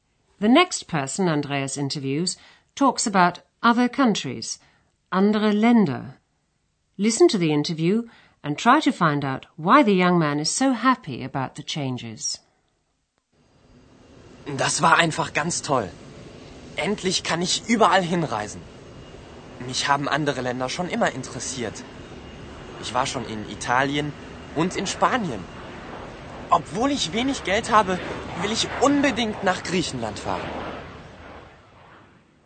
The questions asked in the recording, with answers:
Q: Listen to the interview and try to find out why the young man is so happy about the changes.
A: He's happy because at long last he's free to travel anywhere.